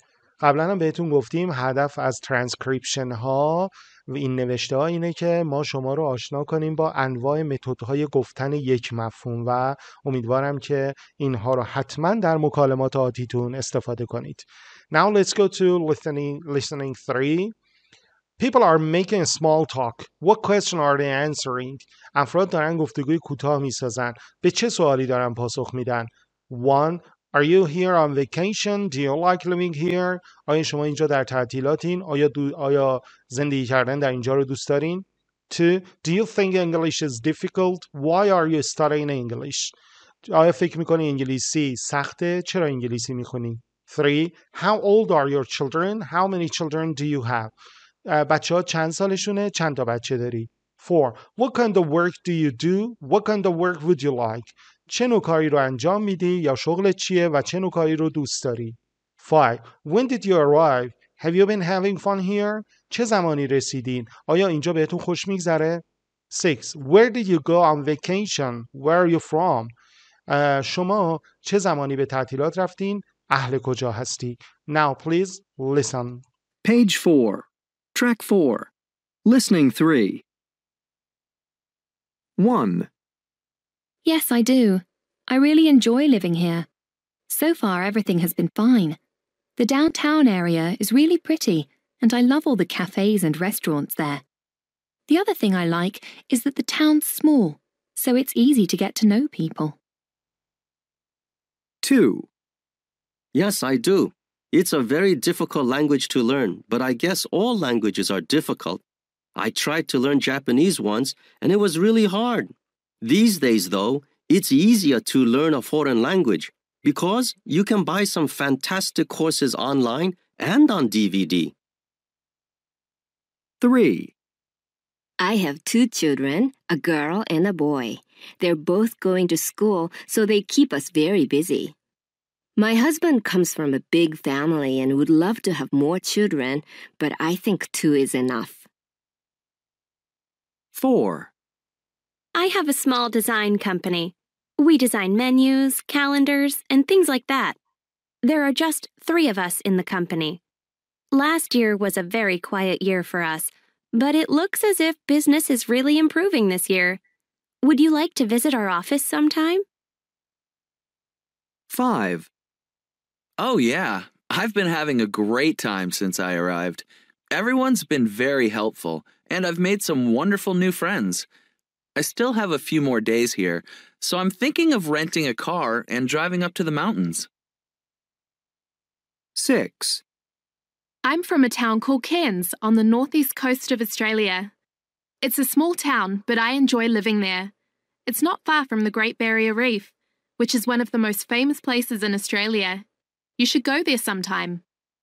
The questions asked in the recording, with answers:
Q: What question are they answering?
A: 1B

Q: What question are they answering?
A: 2A

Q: What question are they answering?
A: 3B

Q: What question are they answering?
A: 4A

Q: What question are they answering?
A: 5B

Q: What question are they answering?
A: 6B